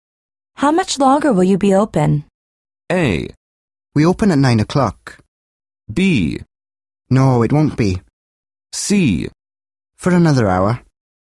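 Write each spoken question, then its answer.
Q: How much longer will you be open?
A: C: For another hour.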